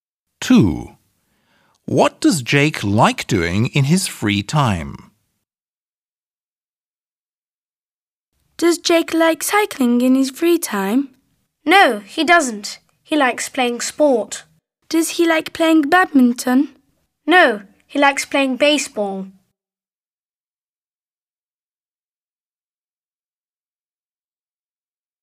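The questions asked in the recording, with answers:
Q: What does Jake like doing in his free time?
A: He likes playing baseball.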